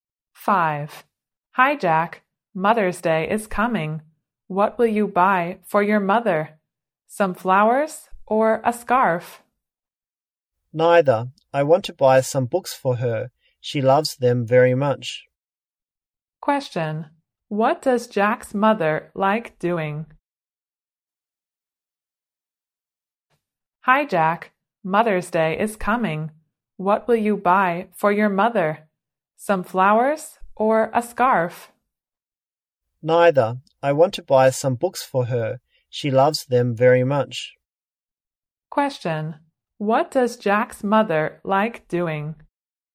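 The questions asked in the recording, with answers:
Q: What does Jack's mother like doing?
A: Reading books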